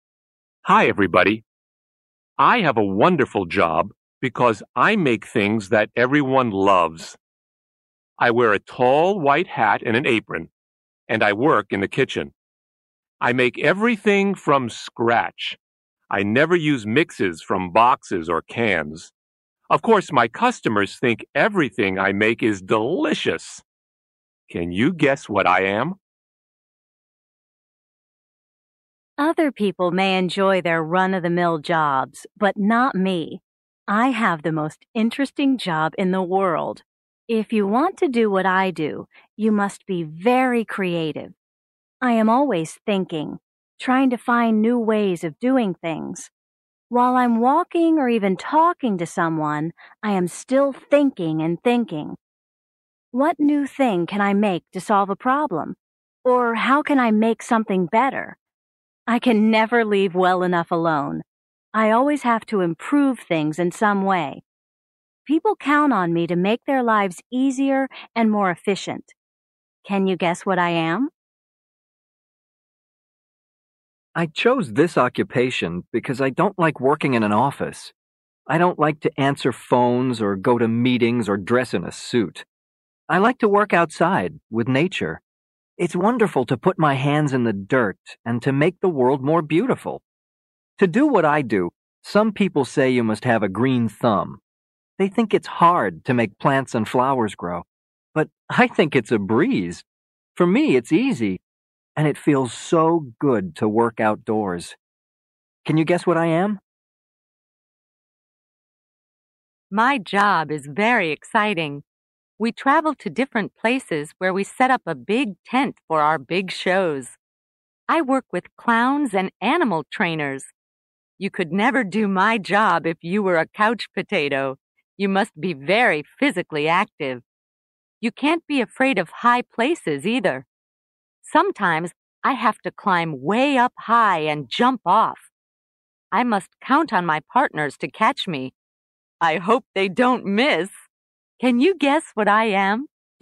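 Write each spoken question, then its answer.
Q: Can you guess what I am?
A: a chef (cook)

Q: Can you guess what I am?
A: an inventor

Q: Can you guess what I am?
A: a gardener

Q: I hope they don't miss. Can you guess what I am?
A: a trapeze artist (circus acrobat)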